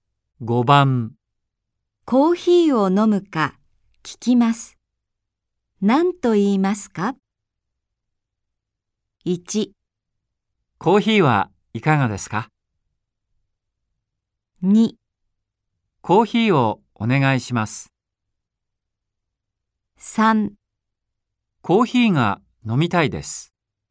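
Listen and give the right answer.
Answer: 1: コーヒーはいかがですか?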